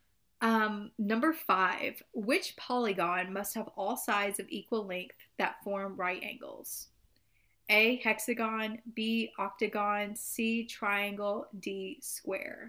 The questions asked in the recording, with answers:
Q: which polygon must have all sides of equal length that form right angles?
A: It's it's square.